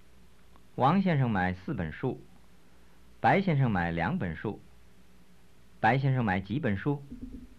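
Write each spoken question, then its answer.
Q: 白先生买几本书?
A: 两本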